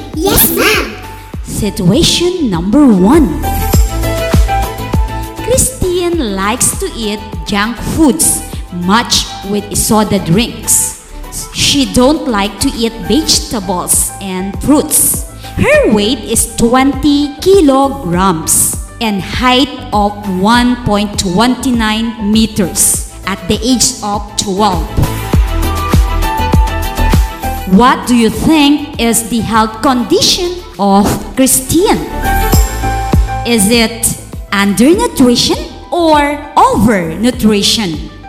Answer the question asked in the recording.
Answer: Ma'am, she is undernutrition.